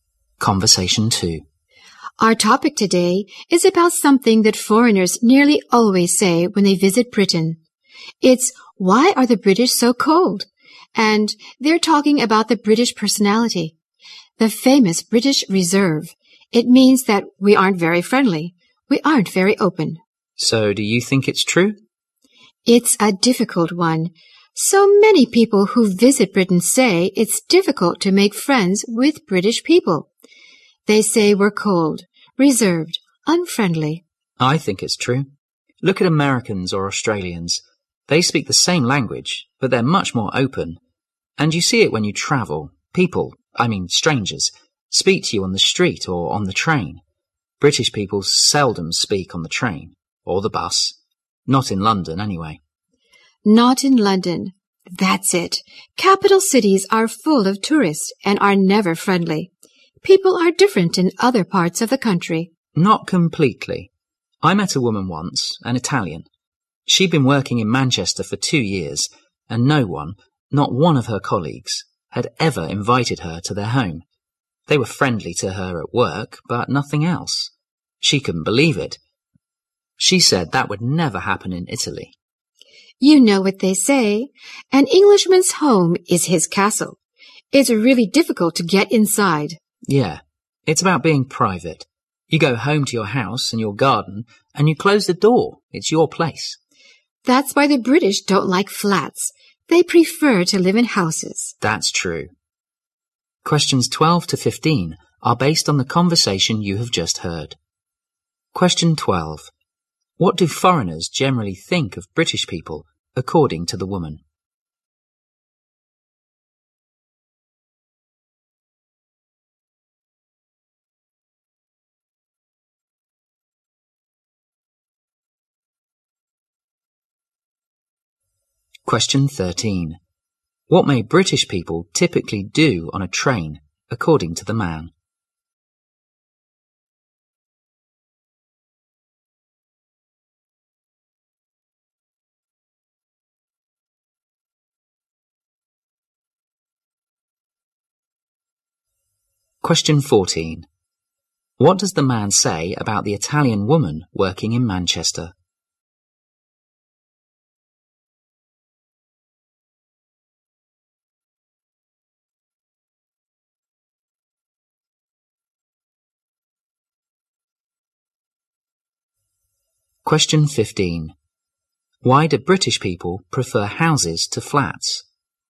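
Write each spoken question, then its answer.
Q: What do foreigners generally think of British people, according to the woman?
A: They are cold, reserved and unfriendly

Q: What may British people typically do on a train, according to the man?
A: Seldom speak to others

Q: What does the man say about the Italian woman working in Manchester?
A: None of her colleagues invited her to their home in 2 years

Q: Why do British people prefer houses to flats?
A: They value privacy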